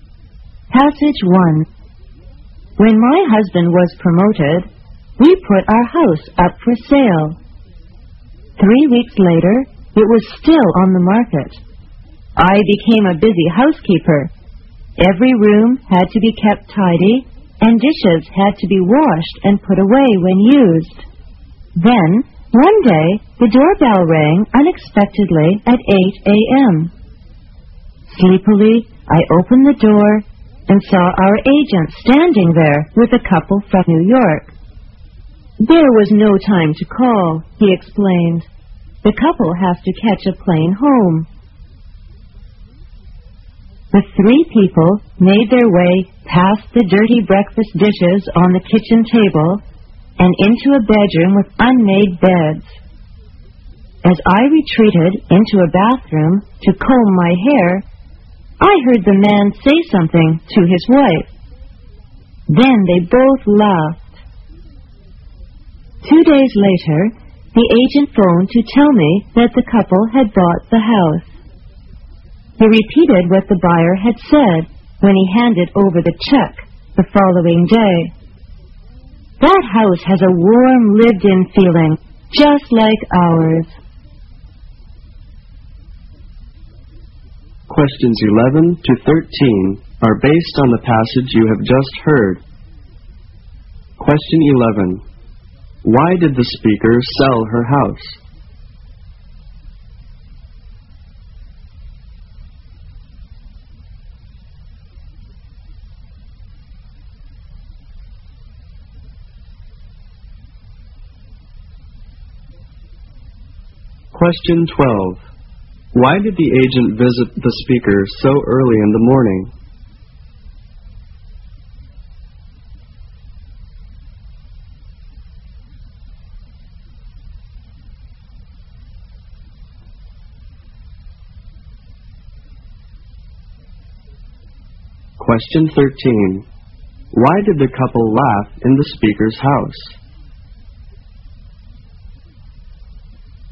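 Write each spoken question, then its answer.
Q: Why did the speaker sell her house?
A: Because her husband was promoted.

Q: Why did the agent visit the speaker so early in the morning?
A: The couple had to catch a plane home, so there was no time to call first.

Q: Why did the couple laugh in the speaker's house?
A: The messy house felt warm and lived-in, just like their own.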